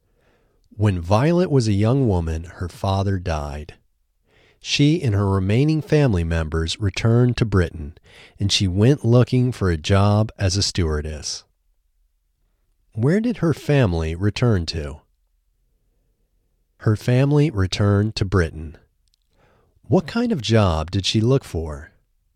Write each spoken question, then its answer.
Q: What kind of job did she look for?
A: She looked for a job as a stewardess.